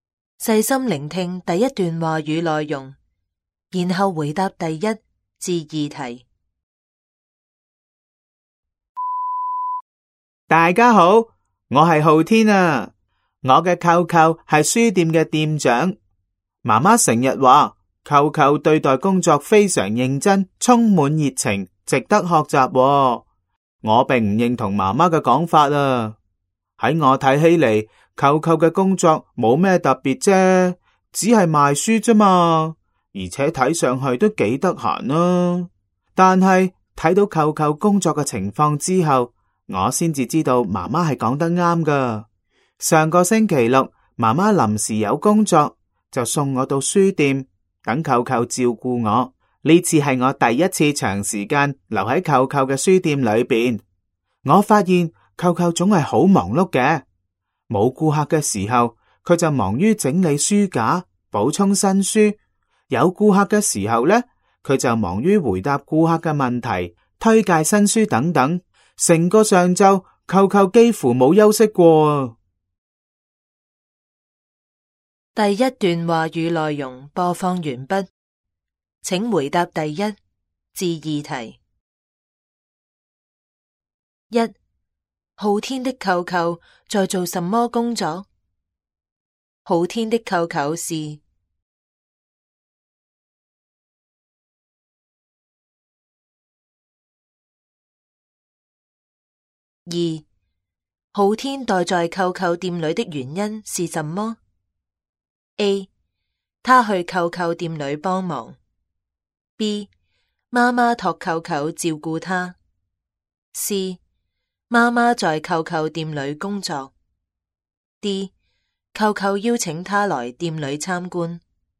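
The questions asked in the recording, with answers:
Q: 浩天的舅舅在做什么工作?浩天的舅舅是。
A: 书店的店长

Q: 浩天待在舅舅店里的原因是什么?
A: B: 妈妈托舅舅照顾他。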